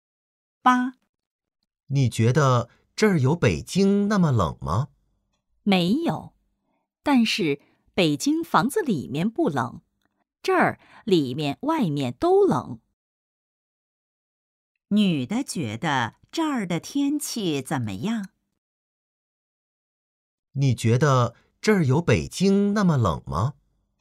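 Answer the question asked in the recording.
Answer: 很冷,里面外面都冷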